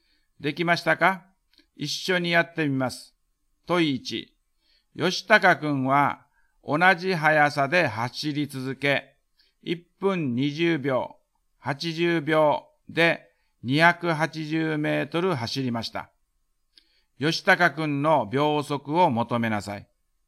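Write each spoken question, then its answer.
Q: 吉高くんの秒速を求めなさい。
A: 秒速3.5メートル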